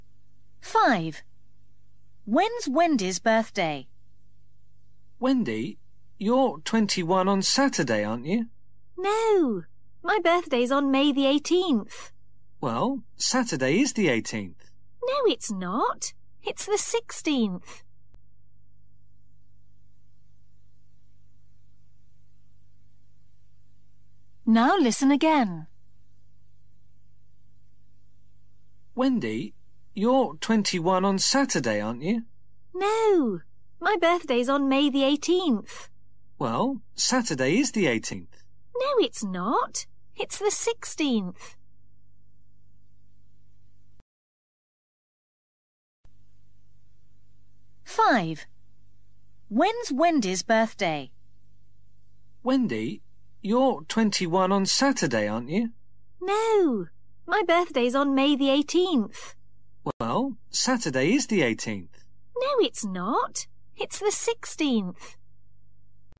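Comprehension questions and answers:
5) When is Wendy's birthday?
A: May the 18th

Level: KELAS 6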